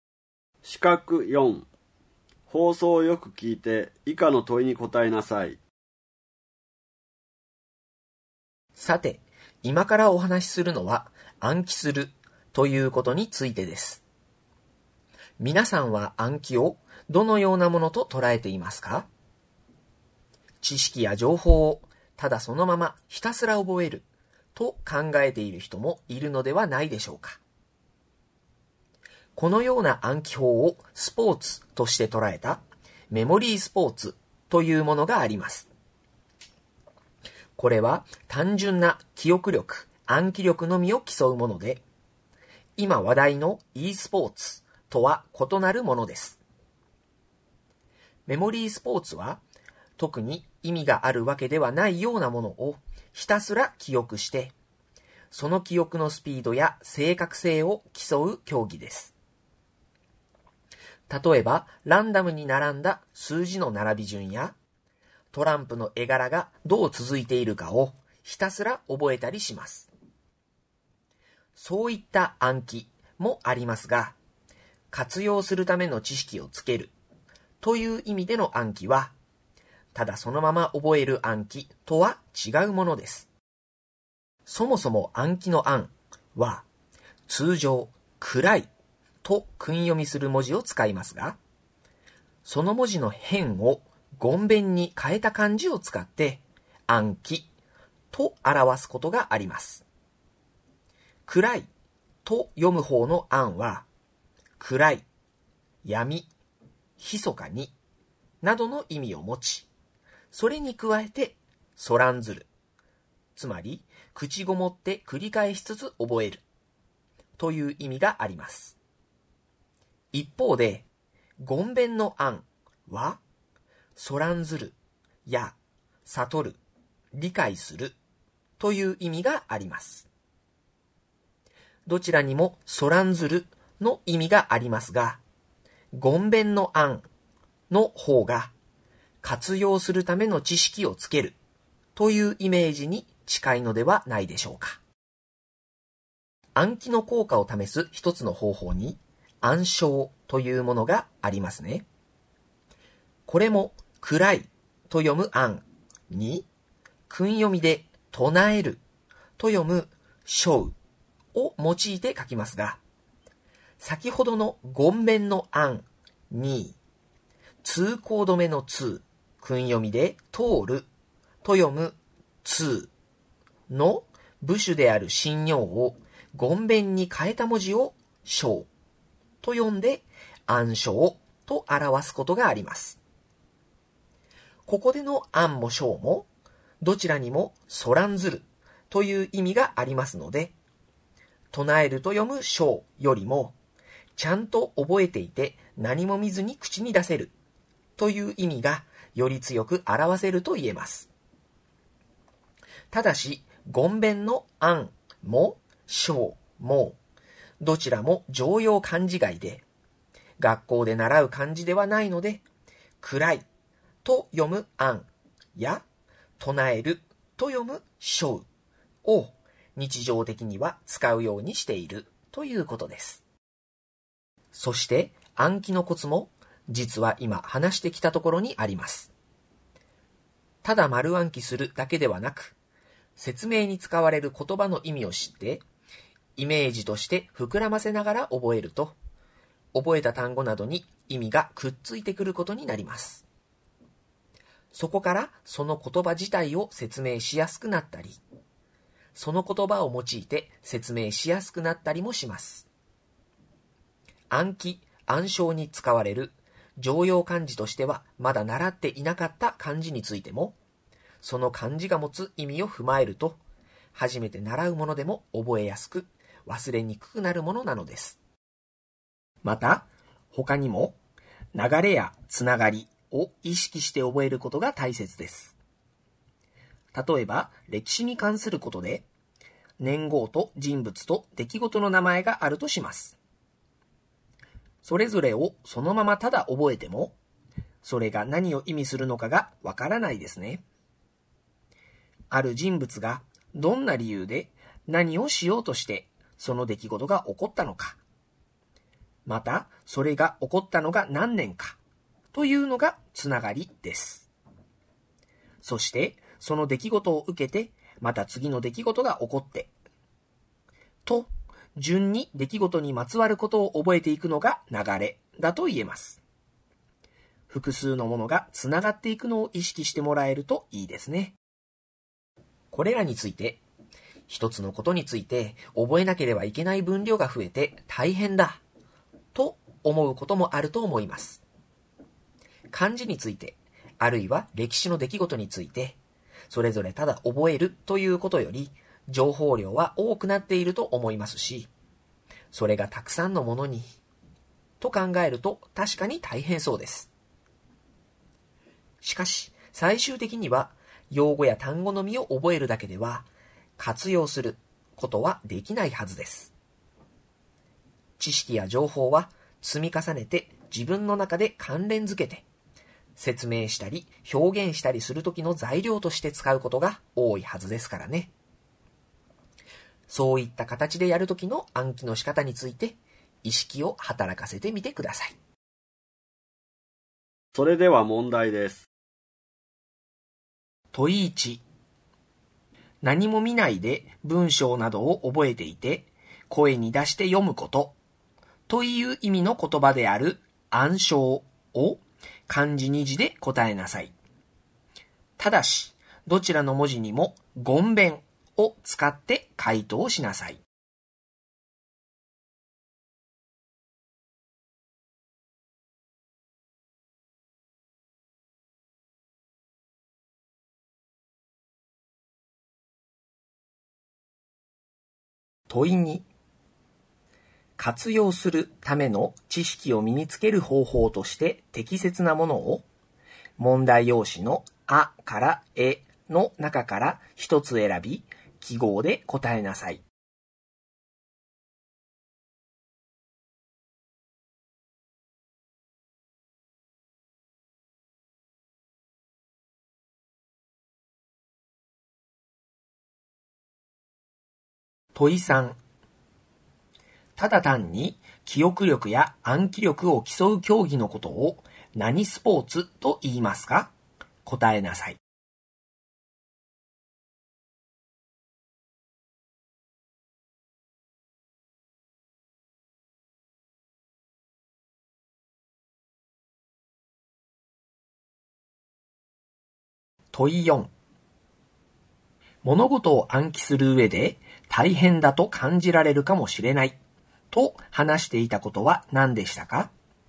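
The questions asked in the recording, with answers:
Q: 何も見ないで文章などを覚えていて声に出して読むことという意味の言葉である暗唱を漢字2字で答えなさい。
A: 諳誦

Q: ただ単に記憶力や暗記力を競う競技のことを何スポーツと言いますか?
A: メモリースポーツ

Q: 物事を暗記する上で大変だと感じられるかもしれないと話していたことは何でしたか?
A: 一つのことについて覚えなければいけない分量が増えること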